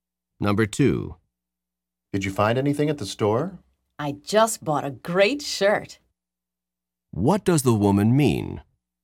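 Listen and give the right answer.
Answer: She found a shirt she likes at the store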